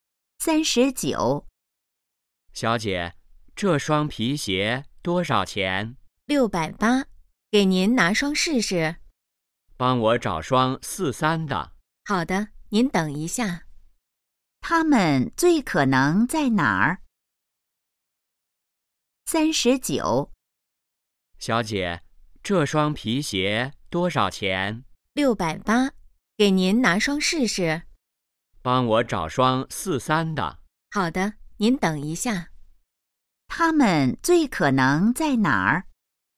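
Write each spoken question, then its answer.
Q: 他们最可能在哪儿?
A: 鞋店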